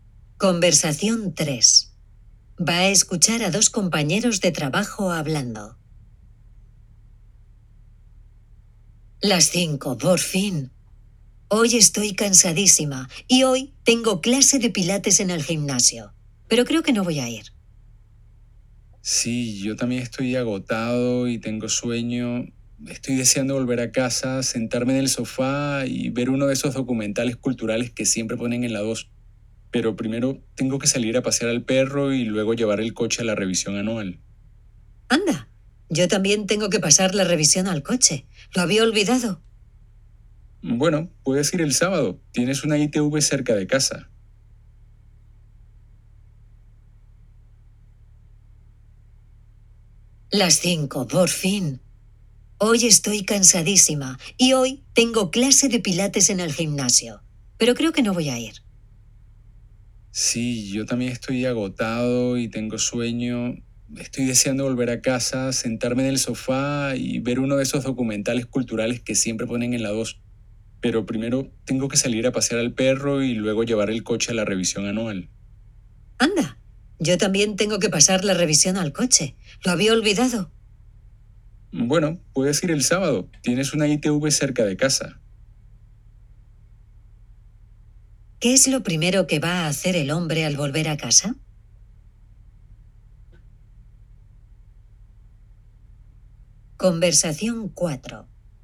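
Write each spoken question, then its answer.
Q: ¿Qué es lo primero que va a hacer el hombre al volver a casa?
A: Sacar a pasear al perro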